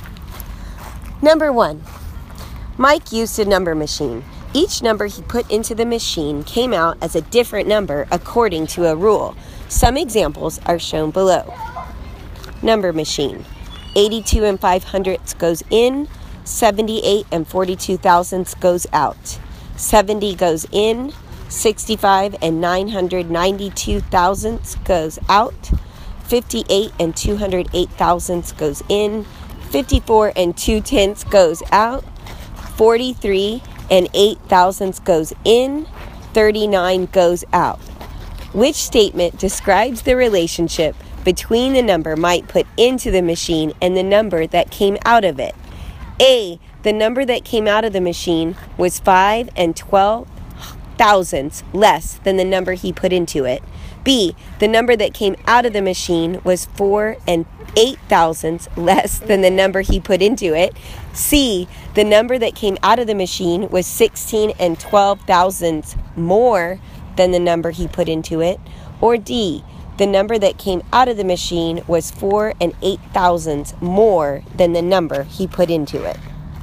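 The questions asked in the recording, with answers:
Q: Which statement describes the relationship between the number Mike put into the machine and the number that came out of it?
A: B: The number that came out of the machine was 4 and 8 thousandths less than the number he put into it.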